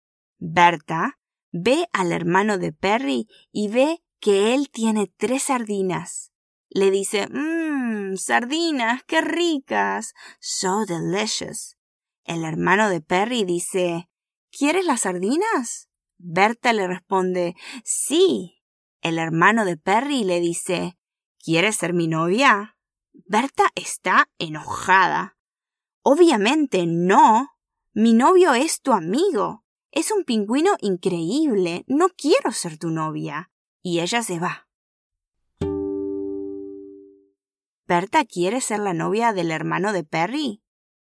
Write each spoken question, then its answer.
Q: ¿Berta quiere ser la novia del hermano de Perry?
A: No. Berta no quiere ser la novia del hermano de Perry, porque ya tiene novio.